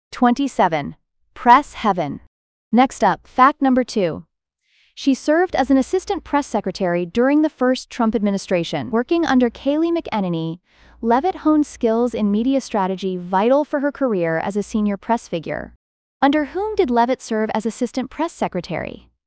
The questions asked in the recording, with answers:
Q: Under whom did Leavitt serve as assistant press secretary?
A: Correct answer, Kayleigh McEnany.